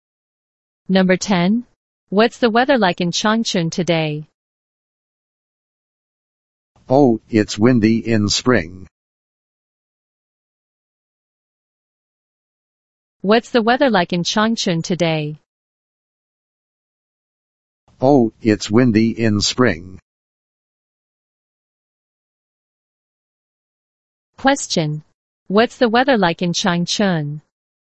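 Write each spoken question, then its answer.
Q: What's the weather like in Changchun?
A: It's windy.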